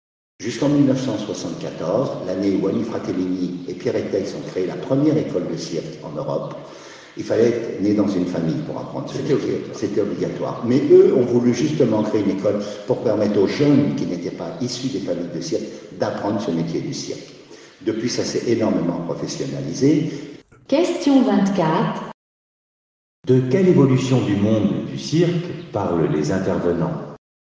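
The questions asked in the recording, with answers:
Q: De quelle évolution du monde du cirque parlent les intervenants ?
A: L'ouverture de l'apprentissage du cirque aux jeunes qui ne sont pas issus de familles de cirque, grâce à la première école (1974), et sa professionnalisation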